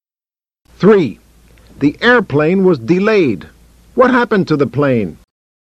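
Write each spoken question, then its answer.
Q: What happened to the plane?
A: It was delayed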